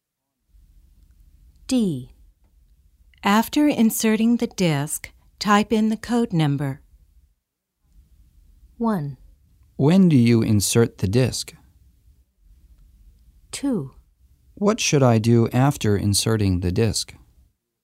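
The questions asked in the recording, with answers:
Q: When do you insert the disc?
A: Before typing in the code number.

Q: What should I do after inserting the disc?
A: Type in the code number.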